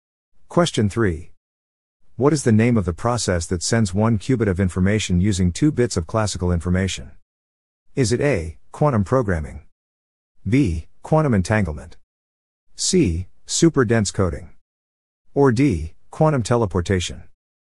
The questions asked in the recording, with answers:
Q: What is the name of the process that sends one qubit of information using two bits of classical information?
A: The answer is D. Quantum teleportation.